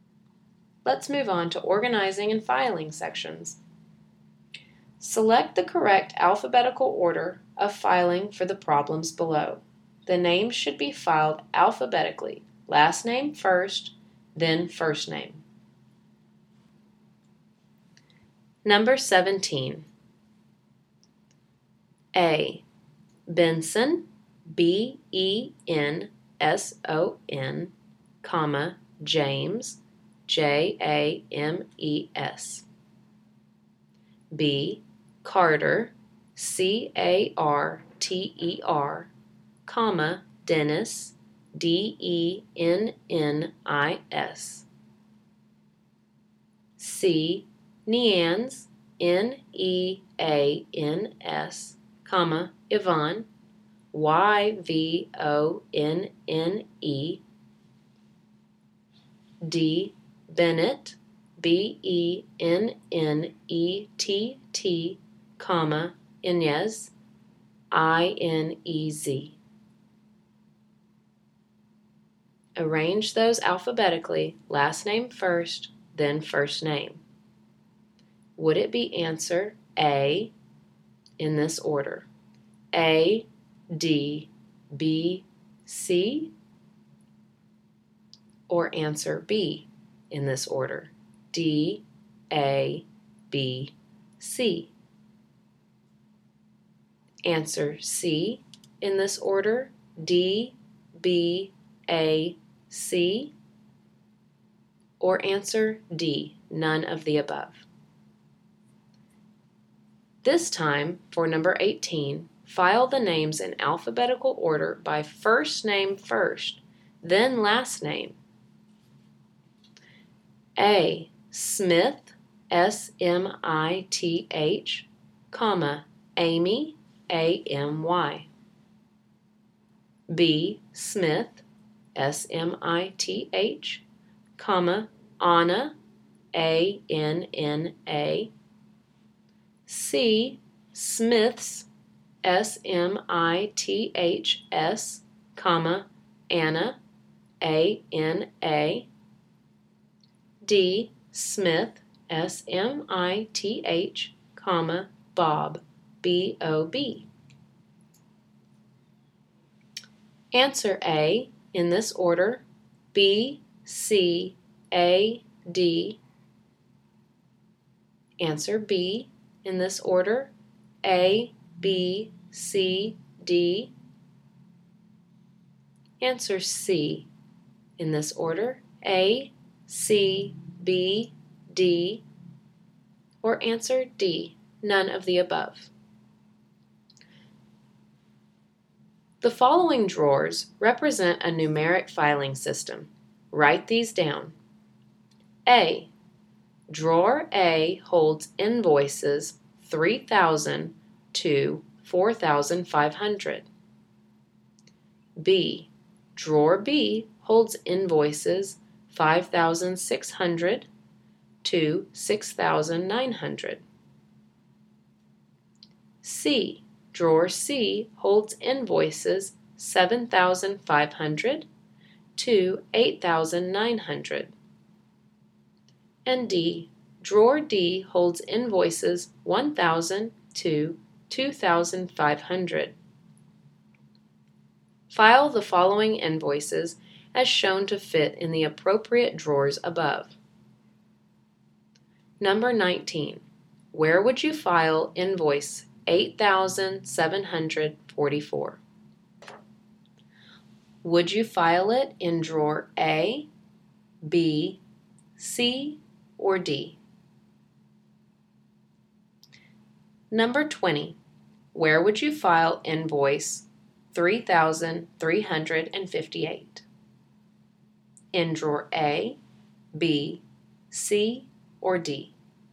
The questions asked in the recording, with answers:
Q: Arrange those alphabetically, last name first, then first name.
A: The answer to number 17 is B.

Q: Where would you file invoice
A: For number 19, the invoice 8,744 would be filed in drawer C.

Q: Where would you file invoice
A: 3,358 would be filed in drawer A.